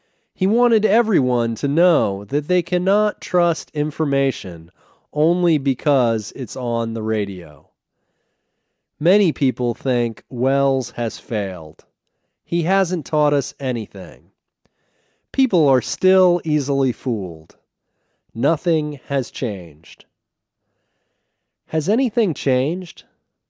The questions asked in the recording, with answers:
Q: Has anything changed?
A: No, nothing has changed. People are still easily fooled.